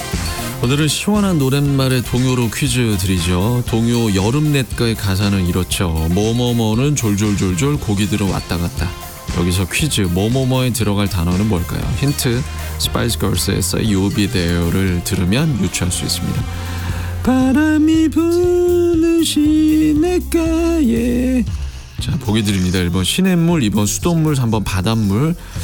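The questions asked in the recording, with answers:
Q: 여기서 퀴즈, 뭐뭐뭐에 들어갈 단어는 뭘까요?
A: 1: 시냇물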